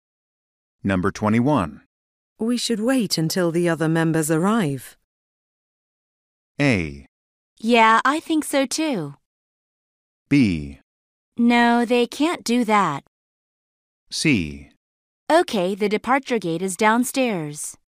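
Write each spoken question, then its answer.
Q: We should wait until the other members arrive.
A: A: Yeah, I think so too.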